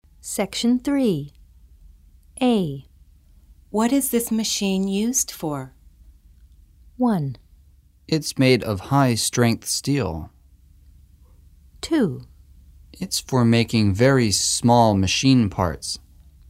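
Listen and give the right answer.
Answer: 2: It's for making very small machine parts.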